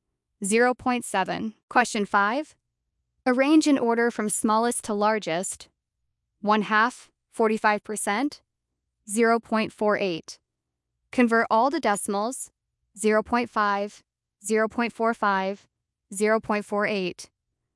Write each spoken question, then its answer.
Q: Question 5. Arrange in order from smallest to largest. 1/2, 45%, 0.48.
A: Order 45%, 0.48, 1/2.